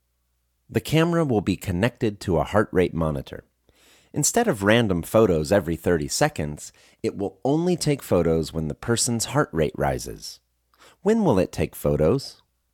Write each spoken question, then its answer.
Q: When will it take photos?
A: It will take photos when the person's heart rate rises.